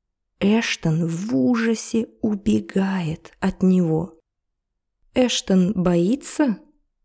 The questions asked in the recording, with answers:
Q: Эштон боится?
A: Да, он боится. Он в ужасе.